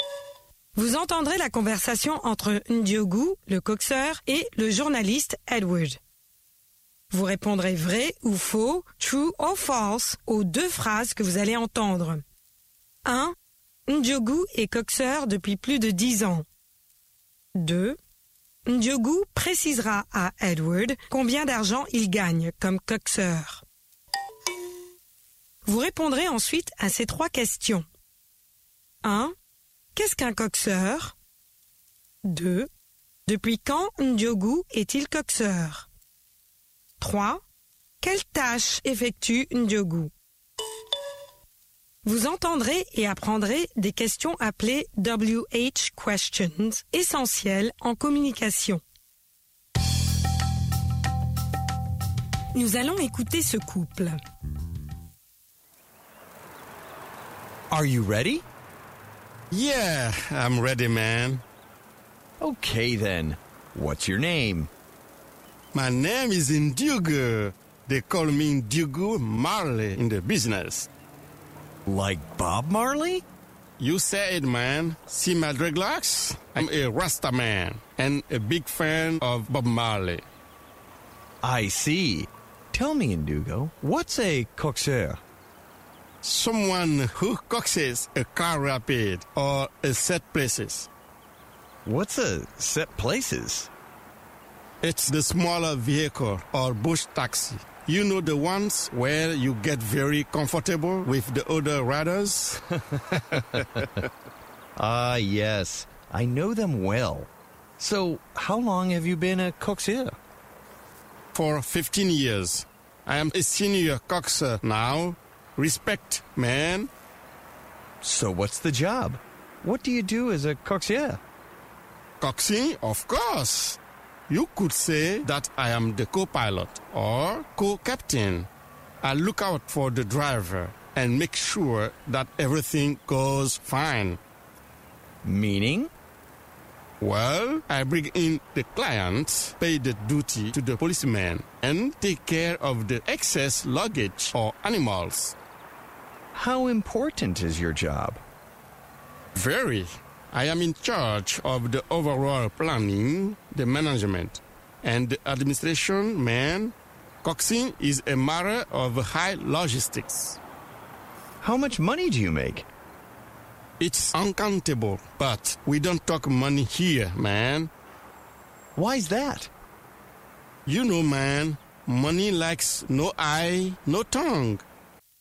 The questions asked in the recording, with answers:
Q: Ndiogou est coxeur depuis plus de 10 ans.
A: L'énoncé 1 est vrai.

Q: Ndiogou précisera à Edward combien d'argent il gagne comme coxeur.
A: L'énoncé 2 est faux.

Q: Qu'est-ce qu'un coxeur?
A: Quelqu'un qui coxe un véhicule.

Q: Depuis quand Ndiogou est-il coxeur?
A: Depuis 15 ans maintenant.

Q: Quelle tâche effectue Ndiogou?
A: Des tâches de planning, de gestion et d'administration.